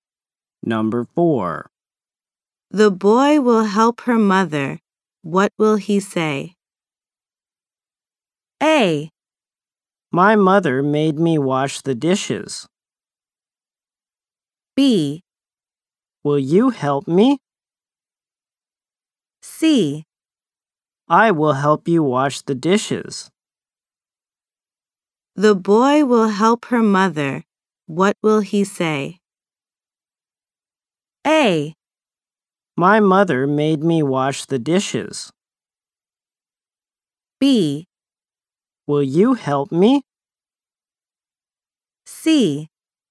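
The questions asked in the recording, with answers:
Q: What will he say?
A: C: I will help you wash the dishes.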